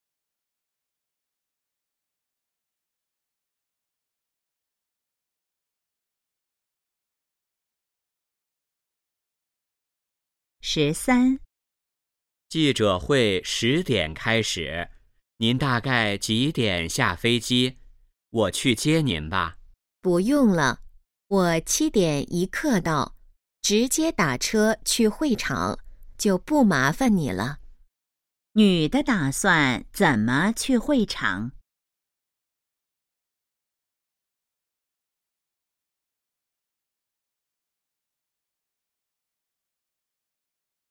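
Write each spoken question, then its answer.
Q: 女的打算怎么去会场?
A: 打车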